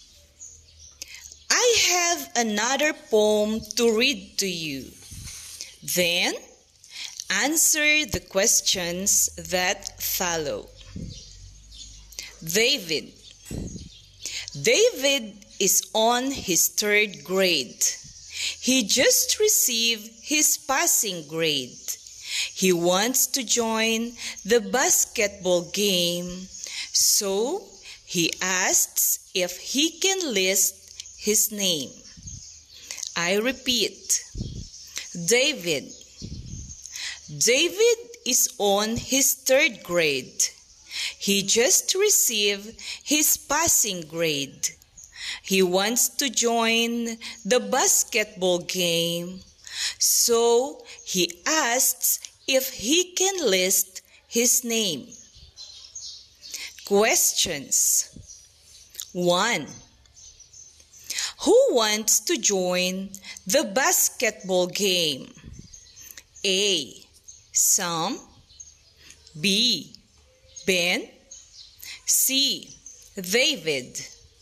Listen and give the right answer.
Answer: The answer is letter C, David.